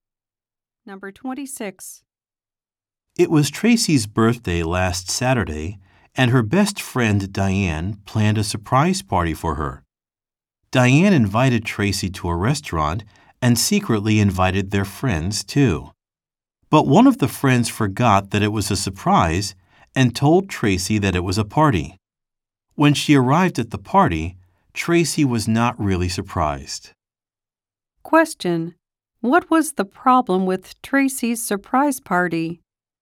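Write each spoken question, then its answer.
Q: What was the problem with Tracy's surprise party?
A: A friend told Tracy about the party.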